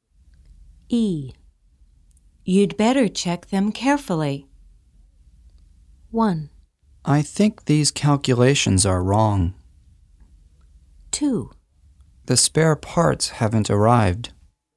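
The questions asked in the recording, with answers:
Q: You'd better check them carefully.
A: 1: I think these calculations are wrong.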